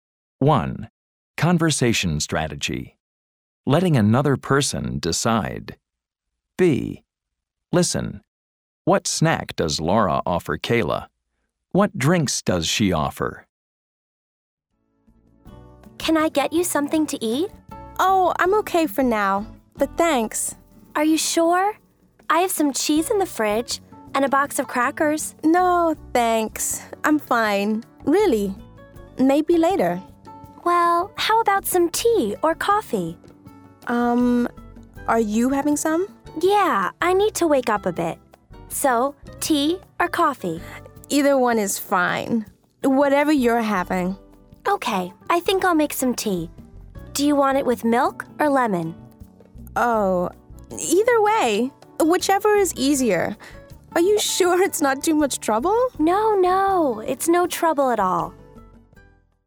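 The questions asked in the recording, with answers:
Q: What snack does Laura offer Kayla?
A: Cheese and crackers

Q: What drinks does she offer?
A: Tea or coffee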